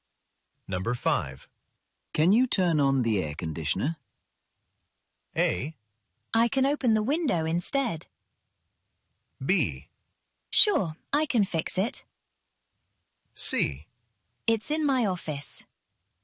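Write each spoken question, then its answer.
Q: Can you turn on the air conditioner?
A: A: I can open the window instead.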